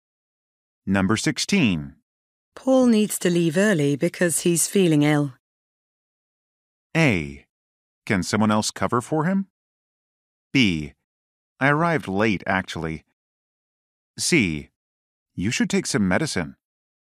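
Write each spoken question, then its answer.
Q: Paul needs to leave early because he's feeling ill.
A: A: Can someone else cover for him?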